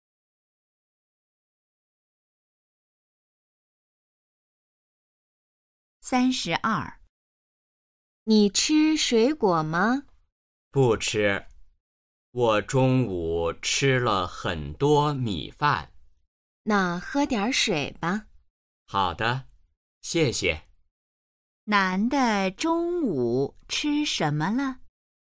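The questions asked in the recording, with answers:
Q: 男的中午吃什么了?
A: 米饭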